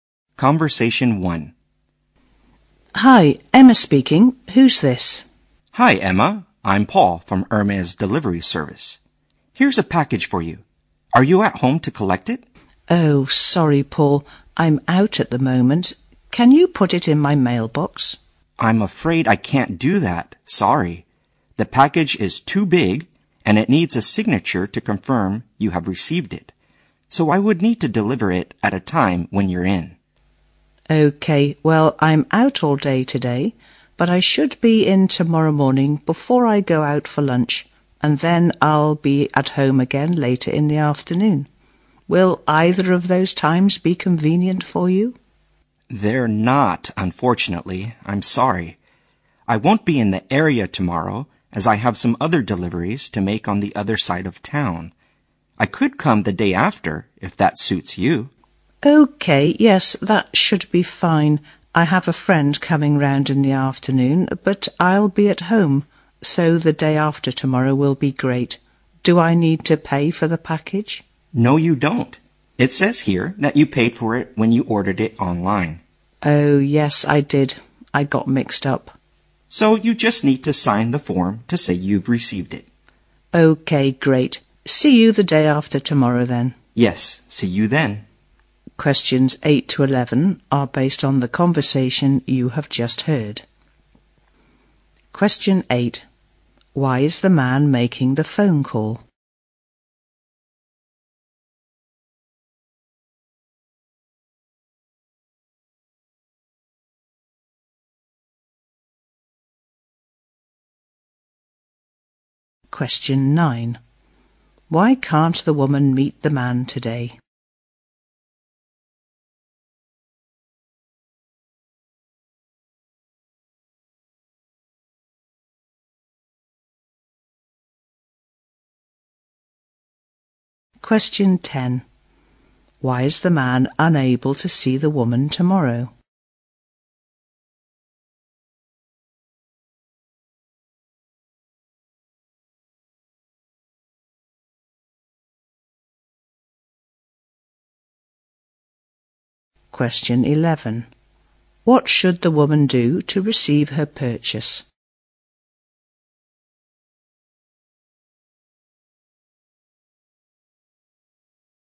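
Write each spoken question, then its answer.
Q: Why is the man making the phone call?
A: To deliver a package to her

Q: Why can't the woman meet the man today?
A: She is out all day

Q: Why is the man unable to see the woman tomorrow?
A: He has other deliveries on the other side of town

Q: What should the woman do to receive her purchase?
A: Sign the form to confirm receipt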